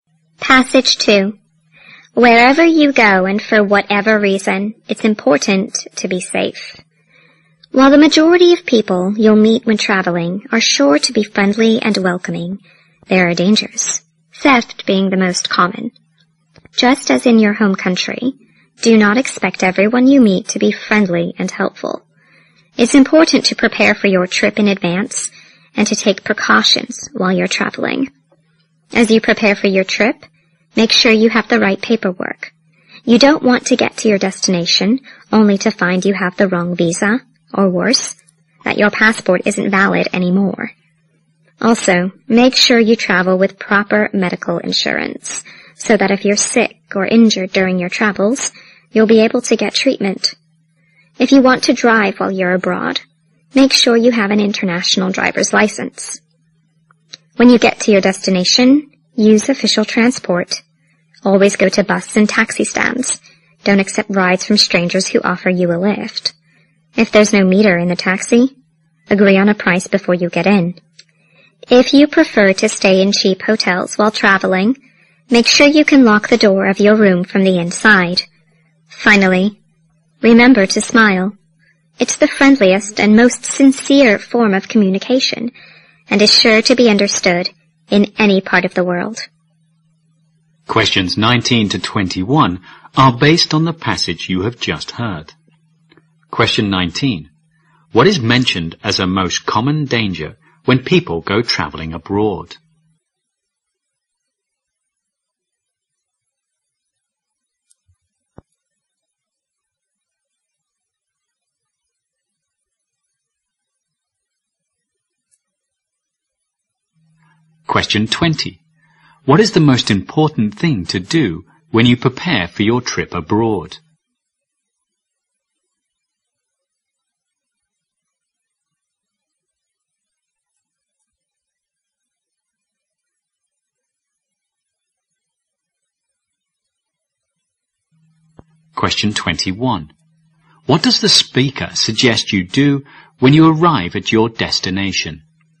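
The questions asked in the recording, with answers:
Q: What is mentioned as a most common danger when people go traveling abroad?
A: Theft.

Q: What is the most important thing to do when you prepare for your trip abroad?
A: Make sure you have the right paperwork.

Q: What does the speaker suggest you do when you arrive at your destination?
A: Use official transport.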